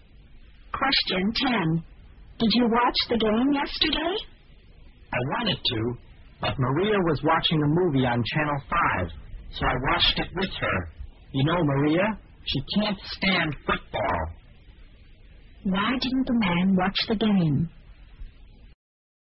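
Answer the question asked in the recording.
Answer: He watched a movie with Maria instead, because she can't stand football.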